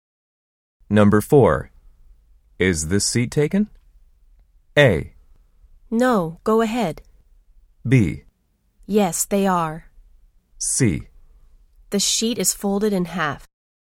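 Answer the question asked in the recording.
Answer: A: No, go ahead.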